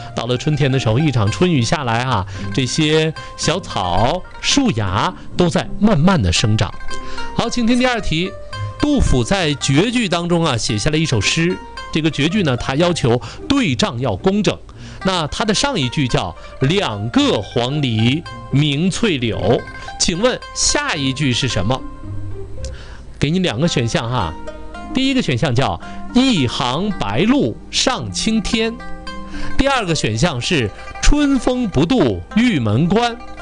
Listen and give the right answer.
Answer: 第一个。